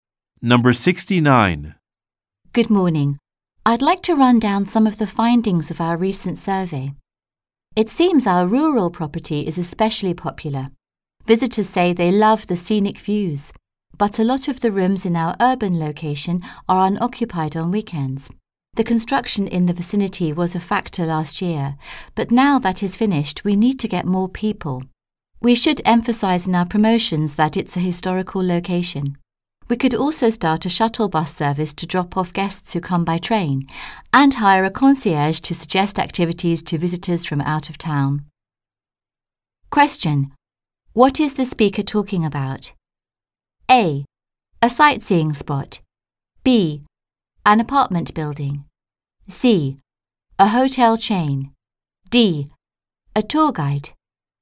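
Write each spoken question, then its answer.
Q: What is the speaker talking about?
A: C: A hotel chain.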